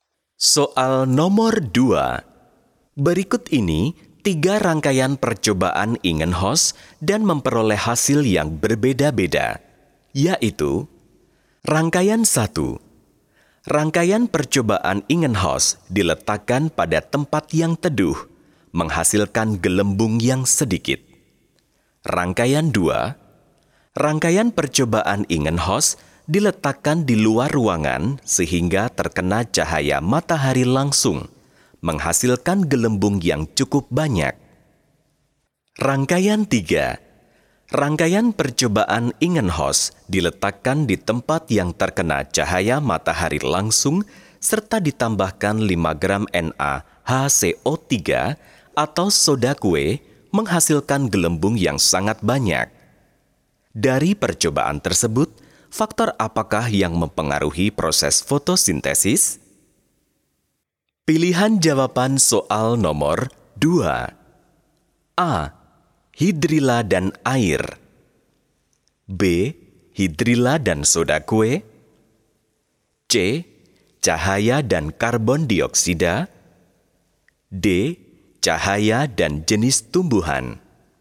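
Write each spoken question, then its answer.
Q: Dari percobaan tersebut, faktor apakah yang mempengaruhi proses fotosintesis?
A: C: Cahaya dan karbon dioksida.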